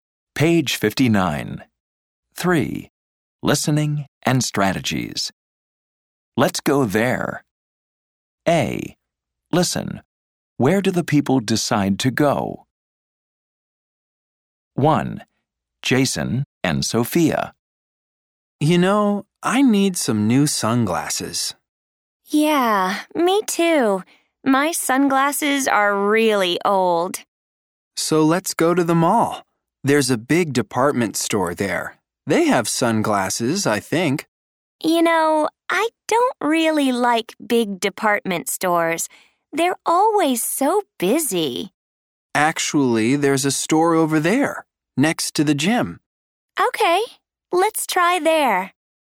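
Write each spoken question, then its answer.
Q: Where do the people decide to go?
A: a store next to the gym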